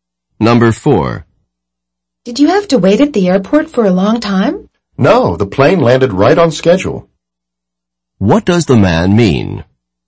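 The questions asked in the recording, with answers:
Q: What does the man mean?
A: He didn't wait long; the plane landed on schedule.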